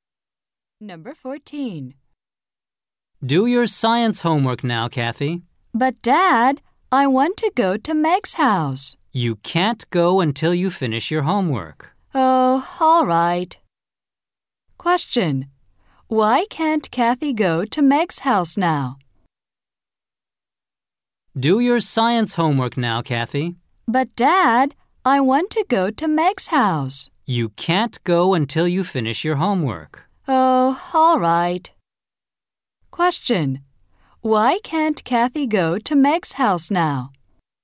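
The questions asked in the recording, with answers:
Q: Why can't Kathy go to Meg's house now?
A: She has to finish her science homework.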